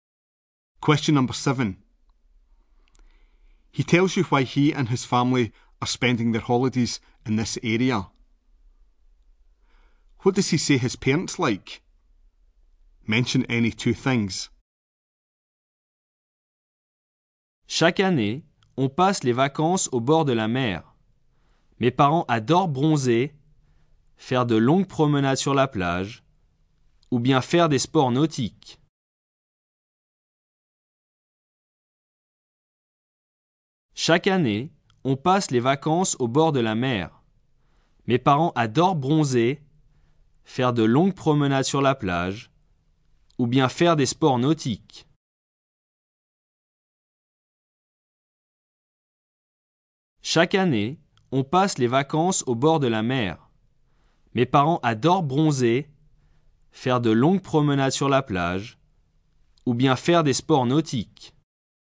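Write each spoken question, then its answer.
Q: What does he say his parents like?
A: Sunbathing, long walks on the beach, water sports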